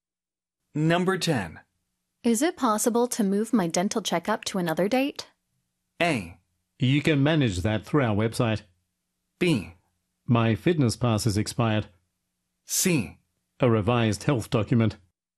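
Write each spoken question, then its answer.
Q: Is it possible to move my dental checkup to another date?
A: A: You can manage that through our website.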